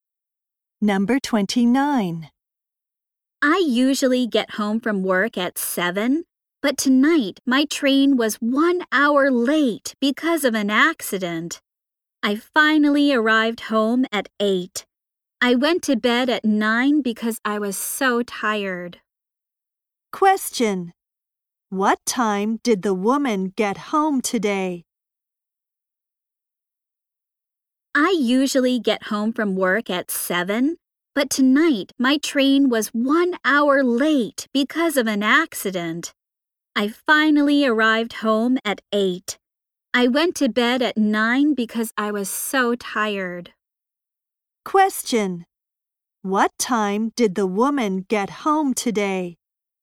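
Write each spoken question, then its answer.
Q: What time did the woman get home today?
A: At 8.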